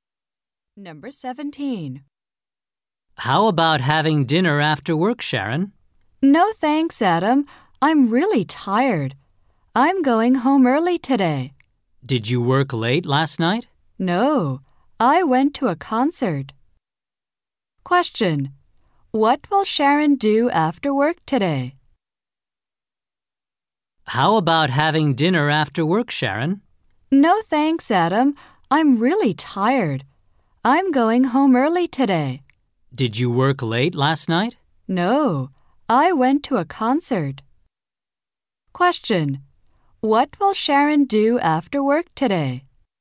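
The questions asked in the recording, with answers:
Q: What will Sharon do after work today?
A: Go home early.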